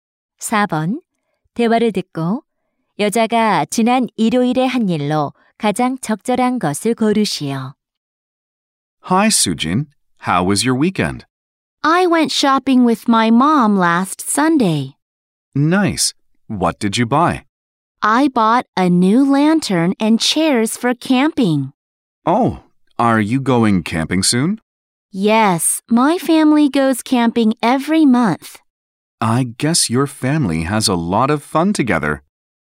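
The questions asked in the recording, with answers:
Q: 대화를 듣고 여자가 지난 일요일에 한 일로 가장 적절한 것을 고르시오.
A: 엄마와 쇼핑하기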